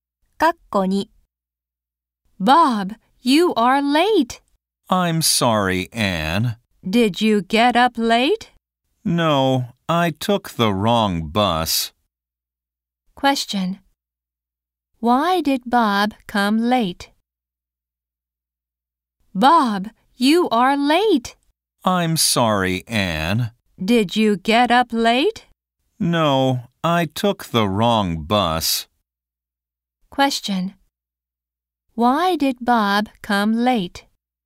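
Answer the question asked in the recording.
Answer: He took the wrong bus.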